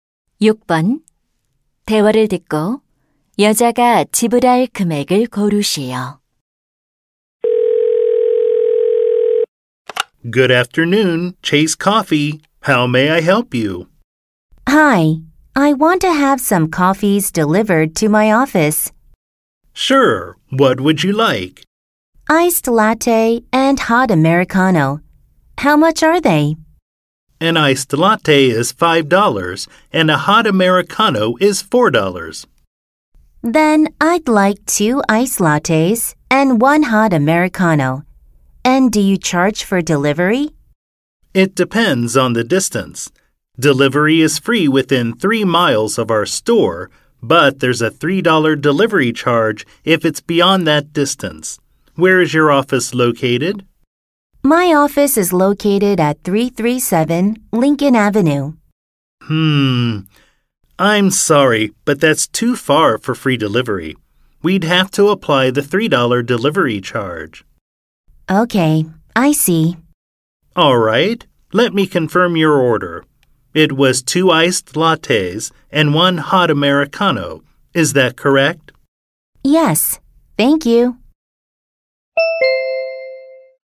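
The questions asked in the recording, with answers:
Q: 대화를 듣고 여자가 지불할 금액을 고르시오.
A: $17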